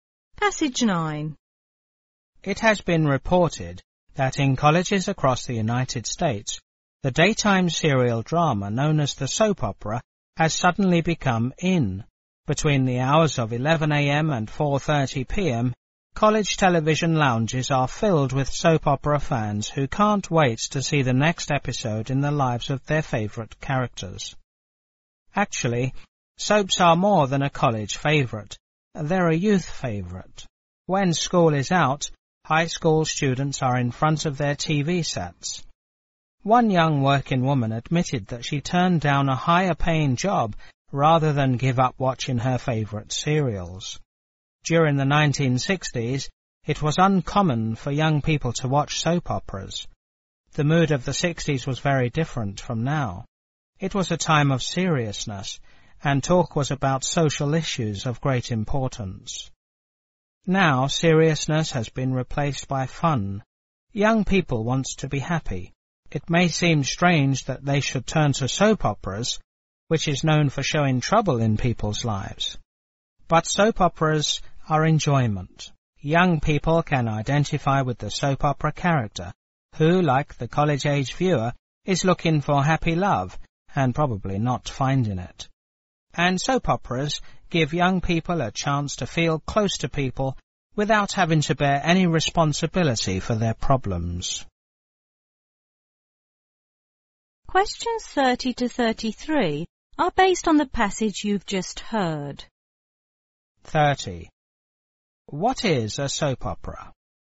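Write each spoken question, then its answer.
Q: What is a soap opera?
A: A daytime serial drama on TV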